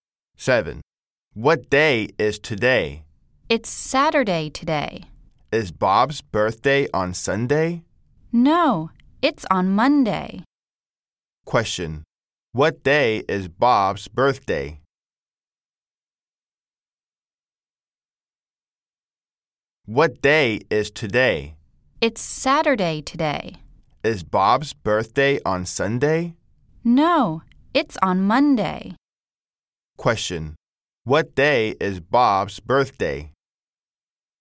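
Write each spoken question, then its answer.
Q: Question, what day is Bob's birthday?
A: Monday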